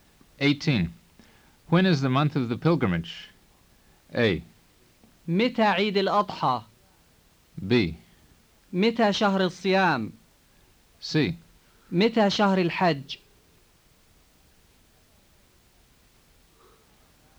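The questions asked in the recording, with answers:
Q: When is the month of the pilgrimage?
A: C: متى شهر الحج؟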